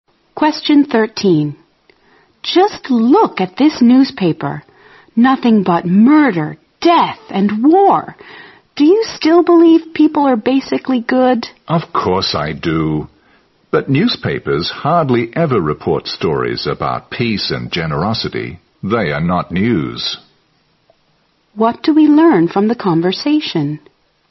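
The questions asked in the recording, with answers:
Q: What do we learn from the conversation?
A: The woman still believes people are basically good; newspapers seldom report stories about peace and generosity.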